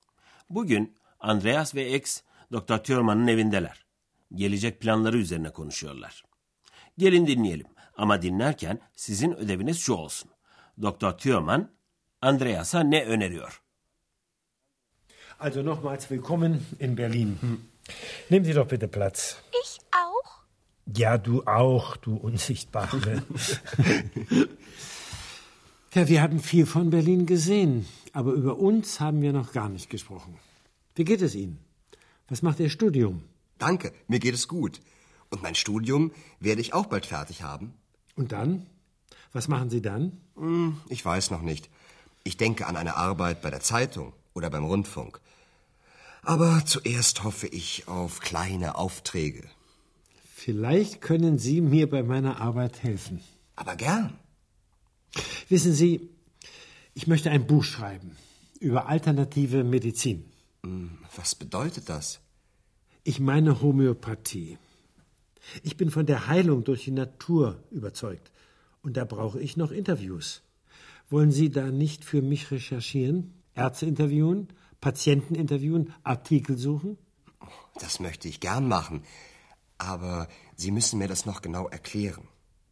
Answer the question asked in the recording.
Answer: Dr. Thürmann, Andreas'a alternatif tıp üzerine yazacağı bir kitap için araştırmacı olarak çalışmasını önerdi.